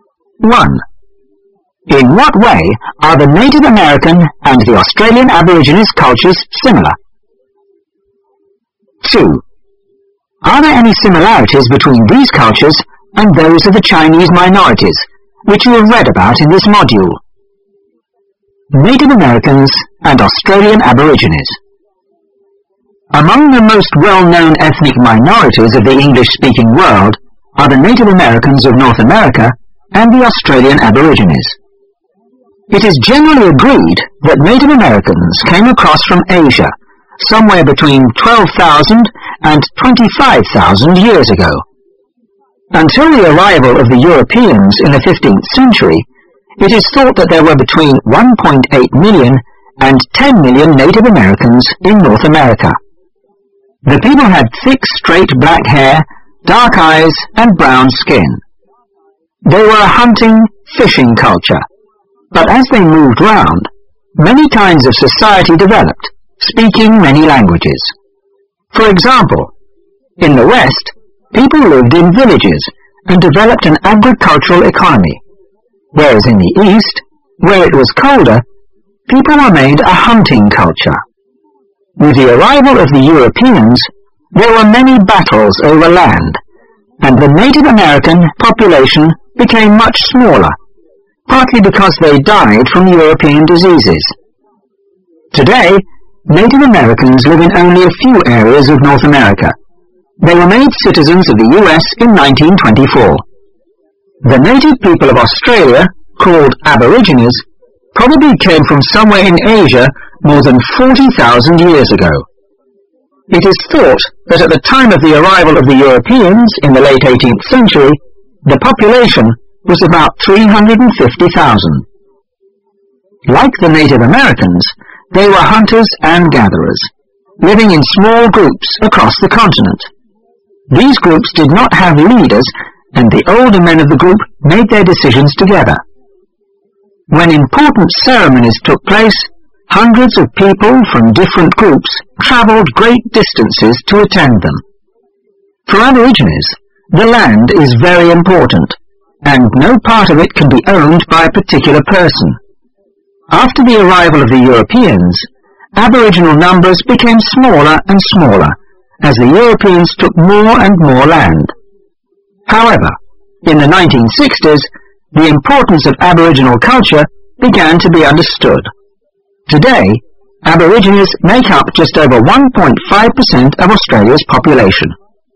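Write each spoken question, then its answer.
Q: In what way are the Native American and the Australian Aborigines cultures similar?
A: Both came from Asia, both were hunting and gathering cultures, and both populations shrank after the Europeans arrived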